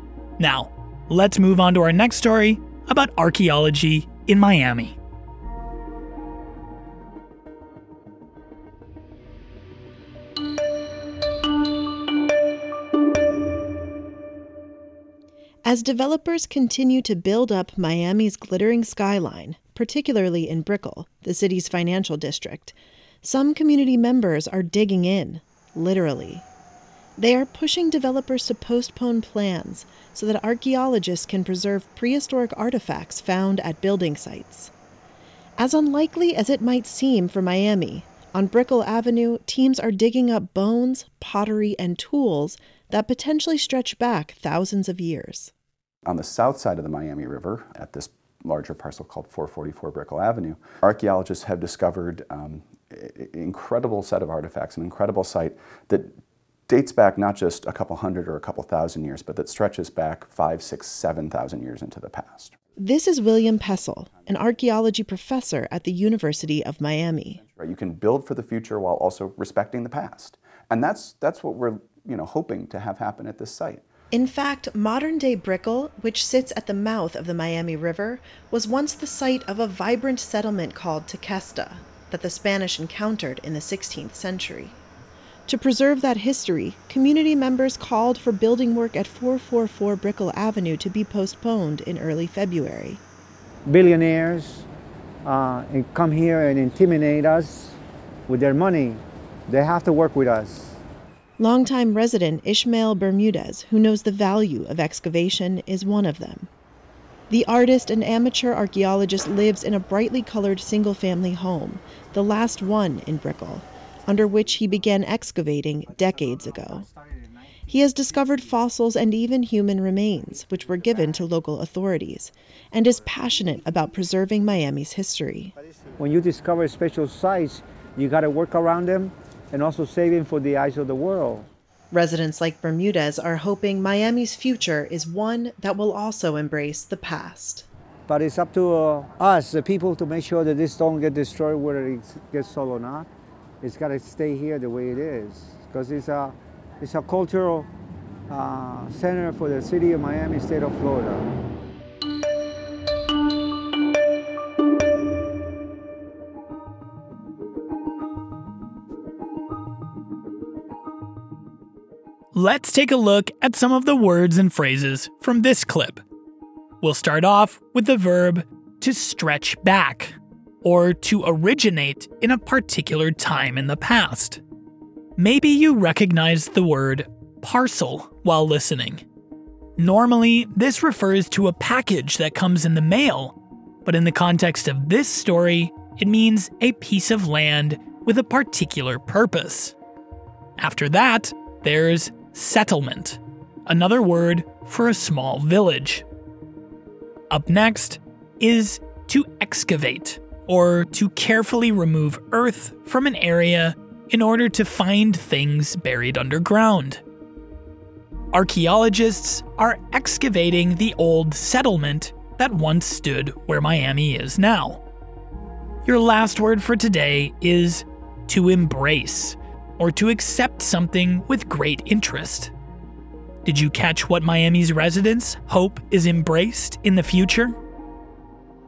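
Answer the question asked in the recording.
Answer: The past (Miami's history)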